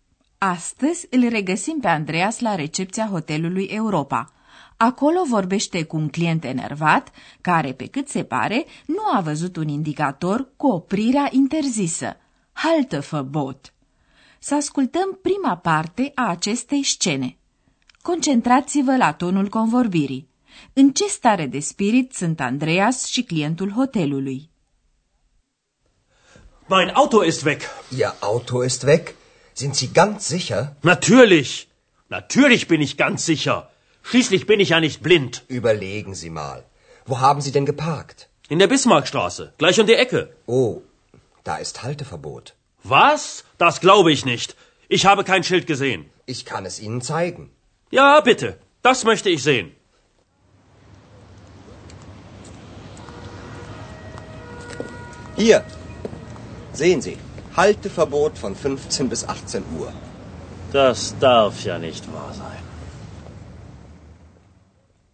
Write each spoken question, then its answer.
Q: În ce stare de spirit sunt Andreas și clientul hotelului?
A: Clientul este foarte supărat și enervat și nu e de mirare pentru că i-a dispărut mașina parcată în apropiere. Andreas rămâne calm.